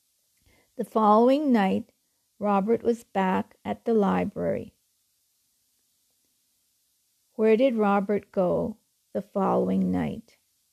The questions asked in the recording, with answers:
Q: Where did Robert go the following night?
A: He was back at the library.